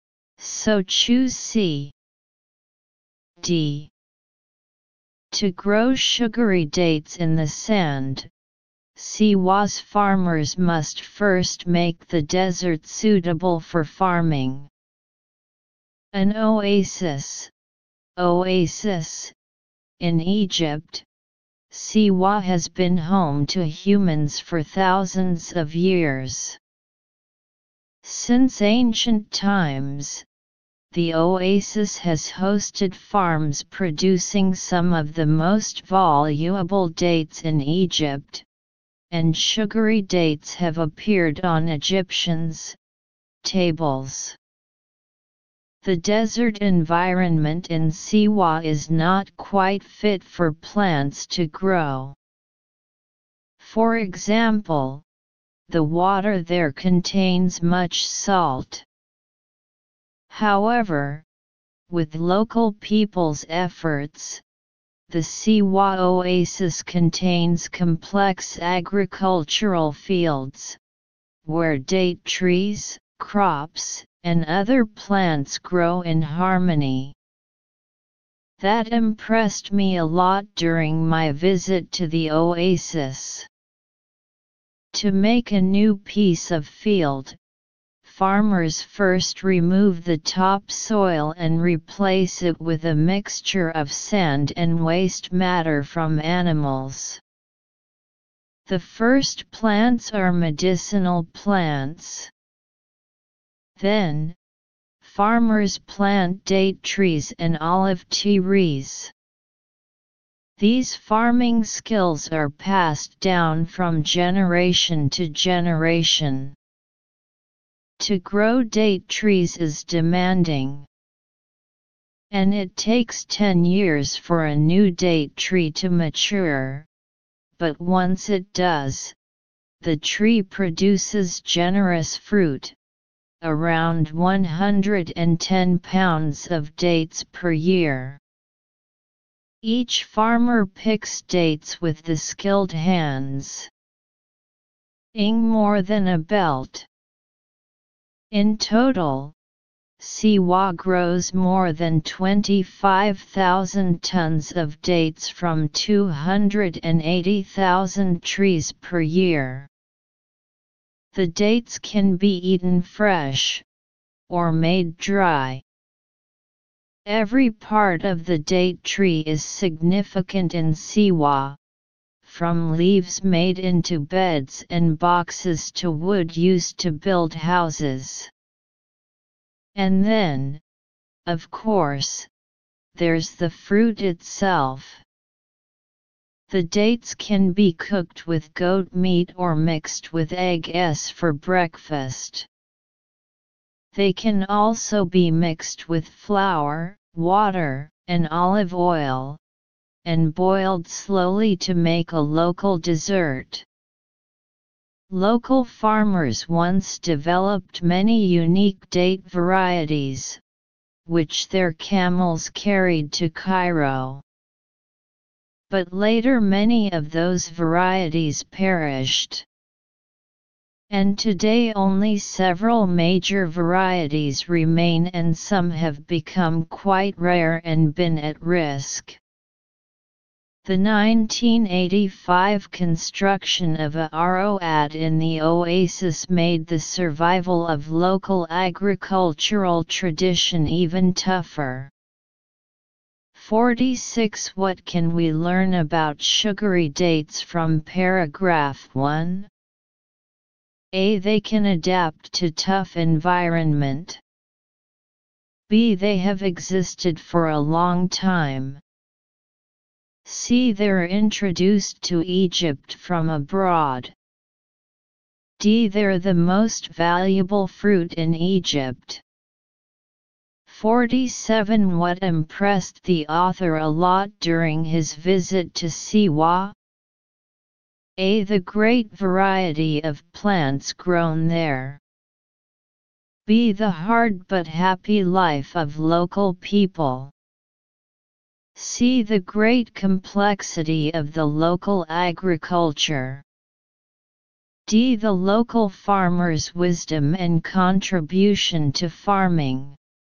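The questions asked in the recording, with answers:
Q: What can we learn about sugary dates from paragraph 1?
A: B: They have existed for a long time.

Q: What impressed the author a lot during his visit to Siwa?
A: C: The great complexity of the local agriculture.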